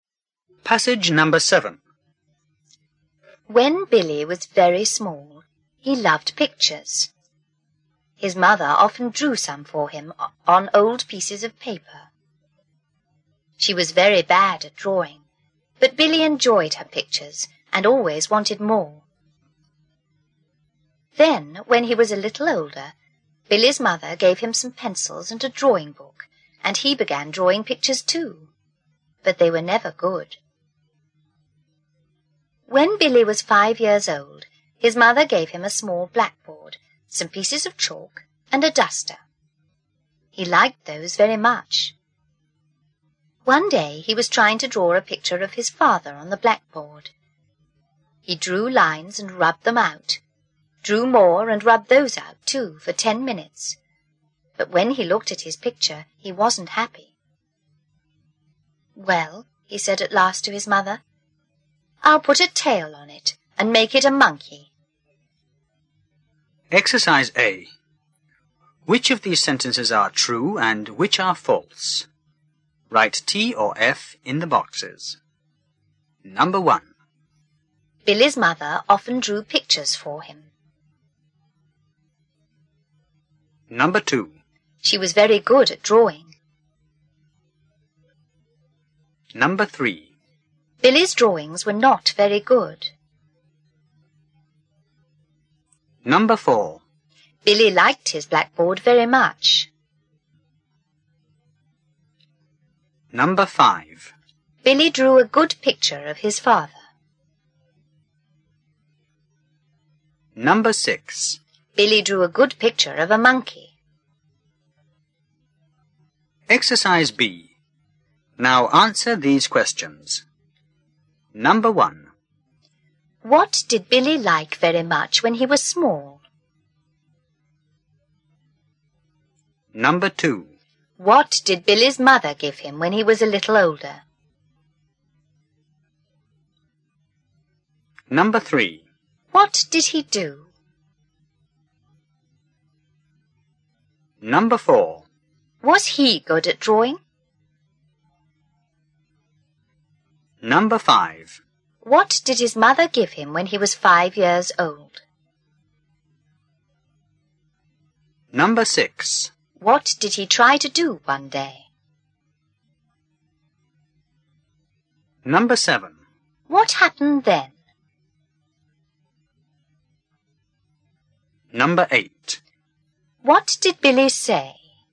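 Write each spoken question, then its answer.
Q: Billy's mother often drew pictures for him.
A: True

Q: She was very good at drawing.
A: False

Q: Billy's drawings were not very good.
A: True

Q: Billy liked his blackboard very much.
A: True

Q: Billy drew a good picture of his father.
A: False

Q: What did Billy like very much when he was small?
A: Pictures

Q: What did Billy's mother give him when he was a little older?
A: Some pencils and a drawing book

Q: What did he do?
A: He began drawing pictures too

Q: Was he good at drawing?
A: No, his pictures were never good

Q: What did his mother give him when he was 5 years old?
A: A small blackboard, some pieces of chalk and a duster

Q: What did he try to do one day?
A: Draw a picture of his father on the blackboard

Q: What happened then?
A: He drew lines and rubbed them out for 10 minutes, and he wasn't happy with the picture

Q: What did Billy say?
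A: "I'll put a tail on it and make it a monkey."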